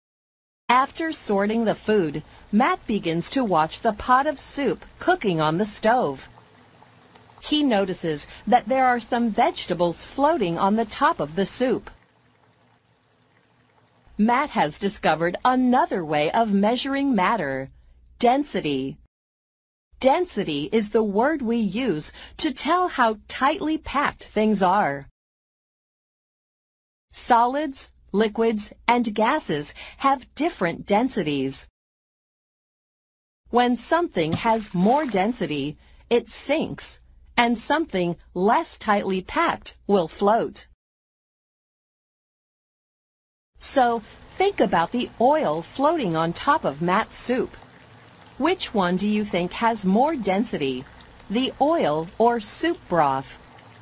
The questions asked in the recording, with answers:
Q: Which one do you think has more density, the oil or soup broth?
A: Soup broth is denser than oil.